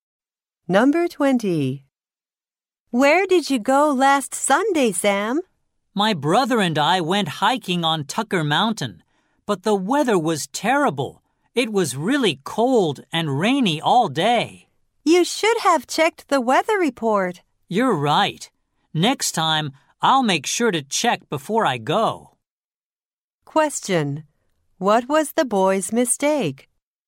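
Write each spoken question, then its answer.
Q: What was the boy's mistake?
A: He didn't check the weather report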